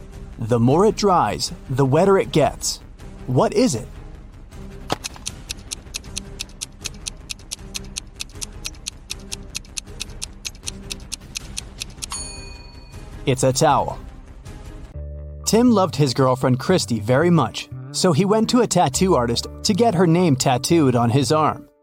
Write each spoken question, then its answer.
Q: What is it?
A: It's a towel.